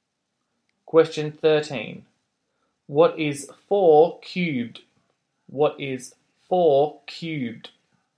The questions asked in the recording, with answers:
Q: What is 4 cubed?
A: the answer is 64.